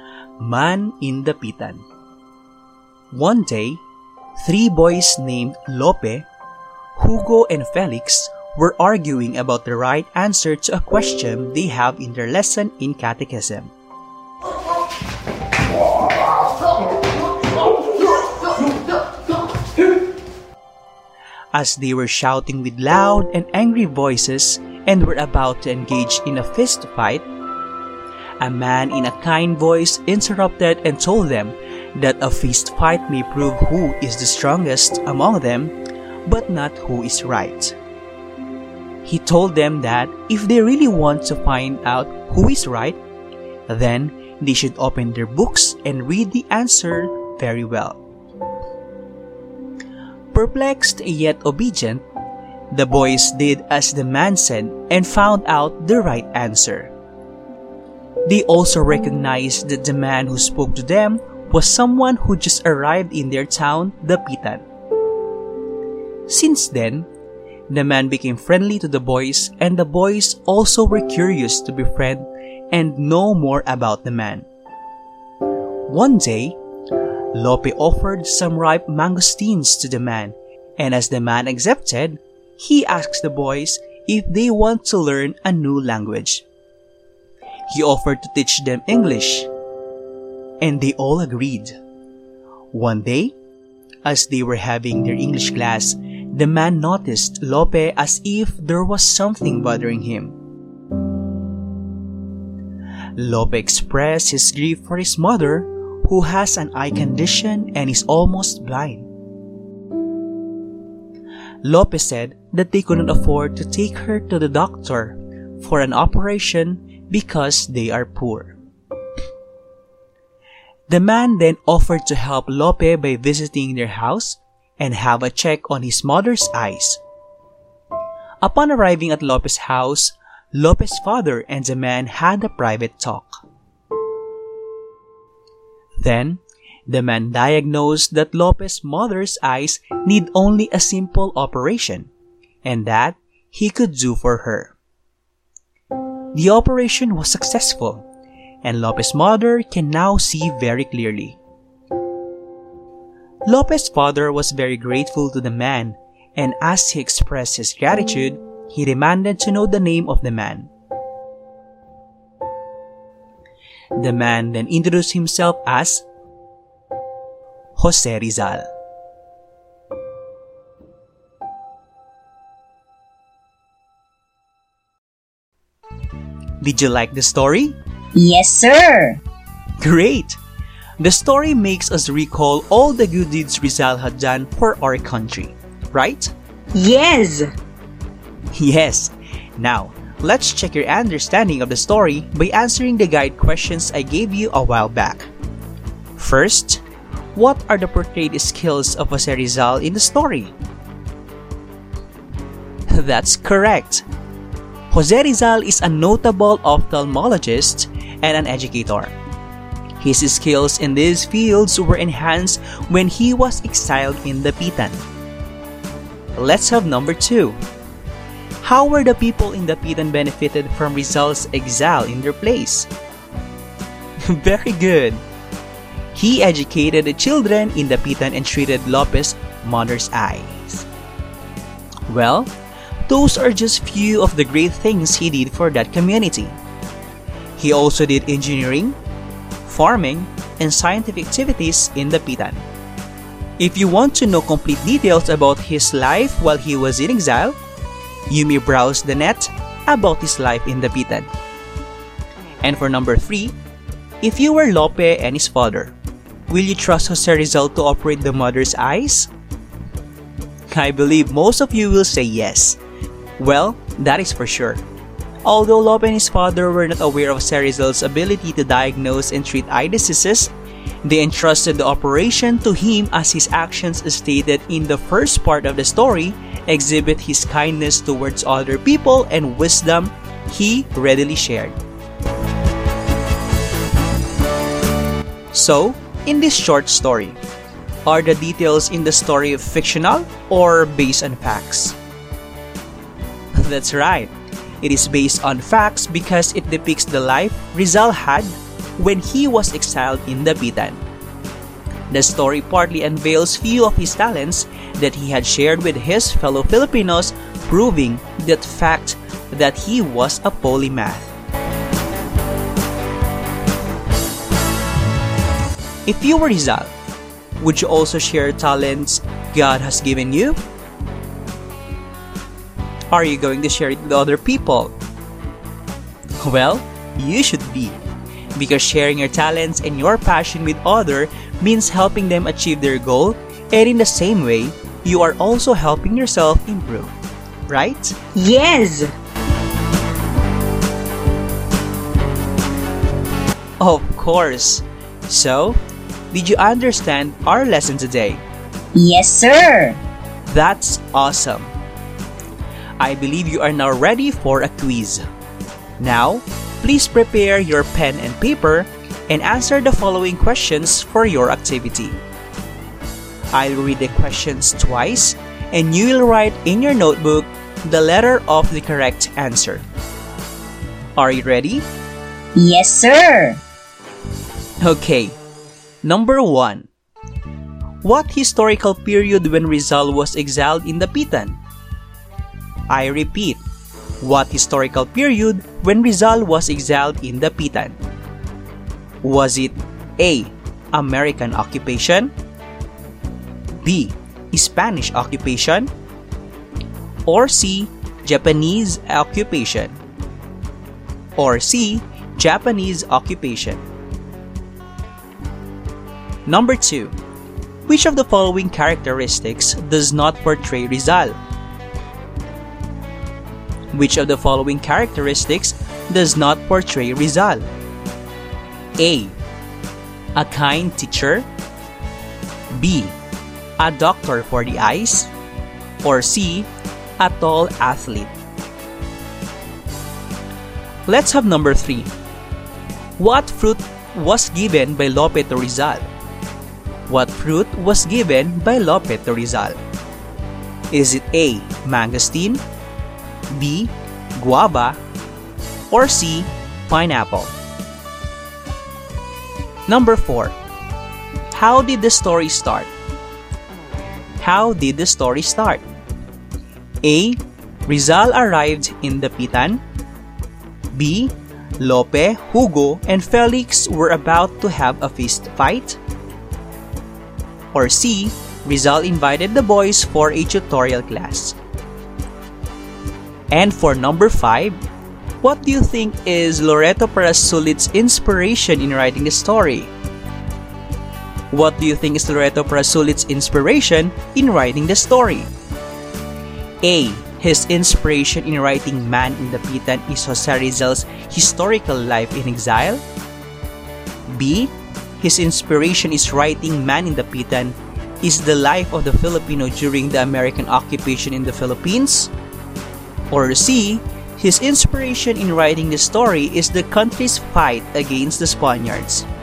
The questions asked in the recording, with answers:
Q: Which of the following characteristics does not portray Rizal?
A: Number 2 is letter C.

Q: What fruit was given by Lope to Rizal?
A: Number 3 is letter A.

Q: How did the story start?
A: Number 4 is letter B.

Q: what do you think is Loreto Parasulit's inspiration in writing the story?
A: And number 5 is letter A.